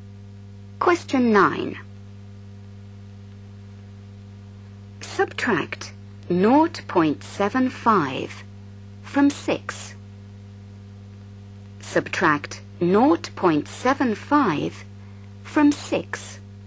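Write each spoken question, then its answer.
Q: Subtract 0.75 from 6.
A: 5.25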